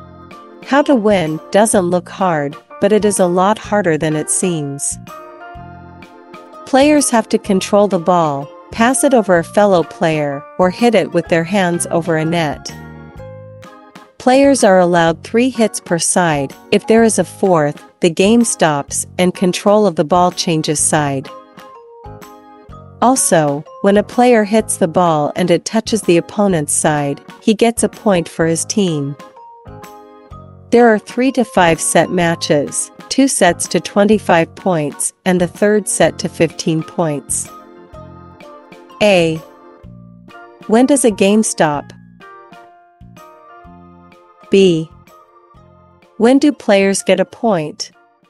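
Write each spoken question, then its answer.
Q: When does a game stop?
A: When there is a 4th hit on one side

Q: When do players get a point?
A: When a player hits the ball and it touches the opponent's side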